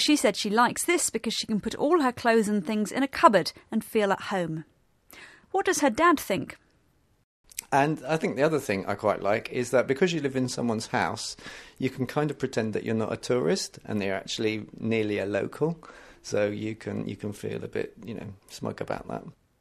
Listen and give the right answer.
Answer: He said that because you're living in someone else's house, you can feel like a local and not a tourist.